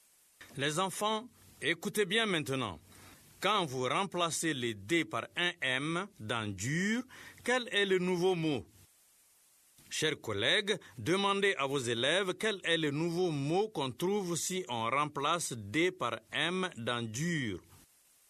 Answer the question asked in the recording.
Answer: Monsieur, c'est mûr.